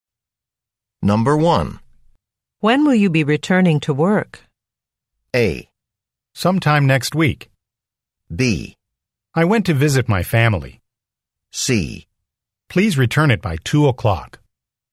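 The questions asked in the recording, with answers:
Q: When will you be returning to work?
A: A: Sometime next week.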